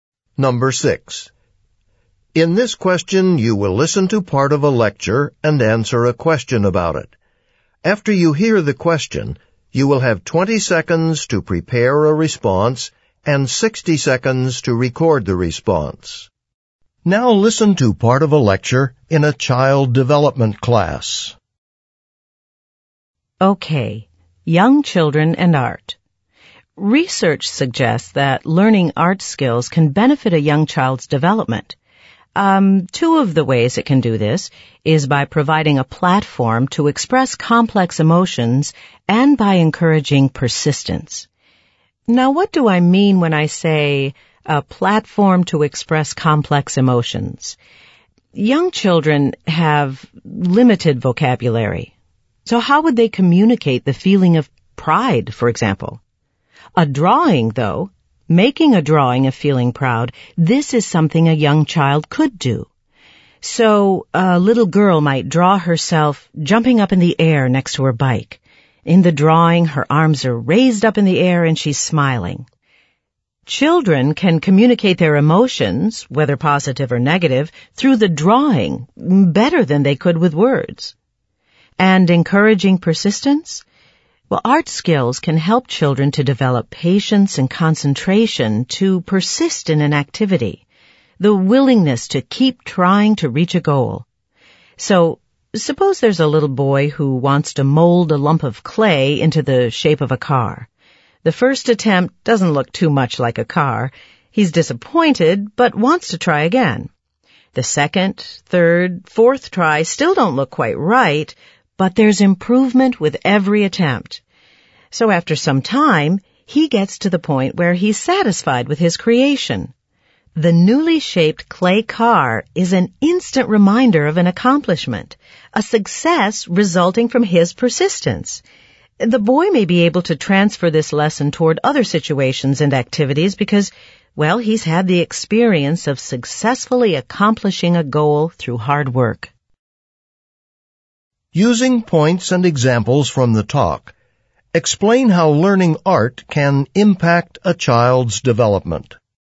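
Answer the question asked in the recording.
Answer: It gives a way to express complex emotions (e.g. a girl drawing herself proud next to her bike) and builds persistence (e.g. a boy who keeps reshaping clay until he makes a car he's happy with).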